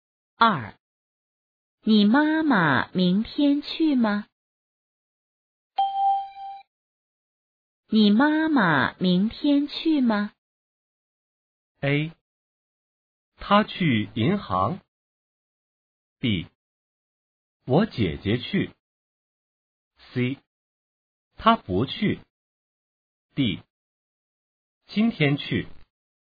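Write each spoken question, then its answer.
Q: 你妈妈明天去吗?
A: C: 她不去。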